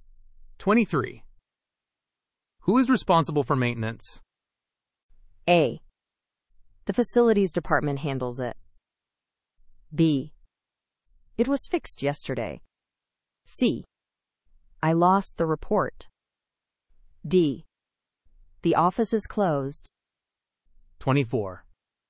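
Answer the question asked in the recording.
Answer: A: The facilities department handles it.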